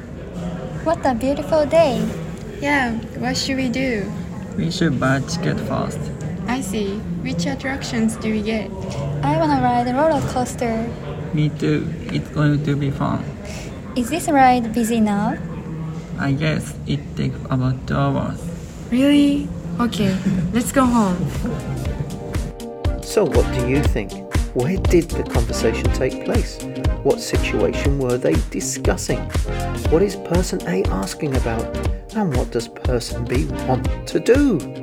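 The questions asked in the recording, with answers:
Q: Where did the conversation take place?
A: At an amusement park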